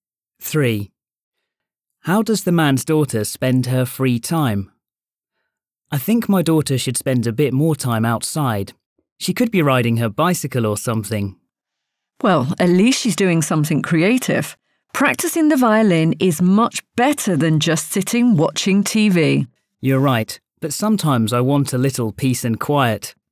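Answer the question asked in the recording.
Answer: Practicing the violin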